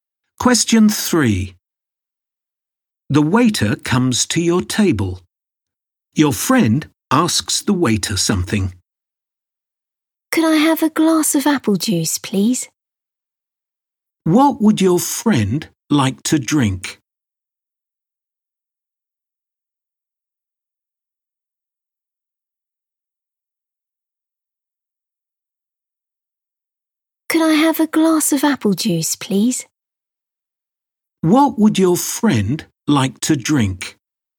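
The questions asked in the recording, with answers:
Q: What would your friend like to drink?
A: A glass of apple juice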